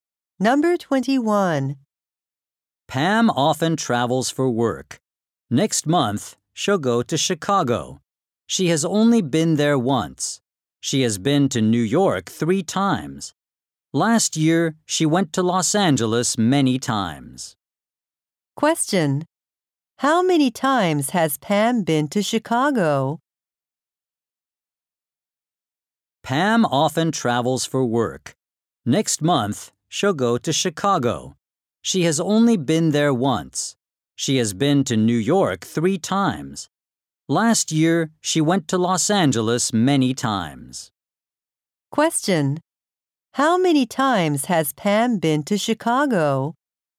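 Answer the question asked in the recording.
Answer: Once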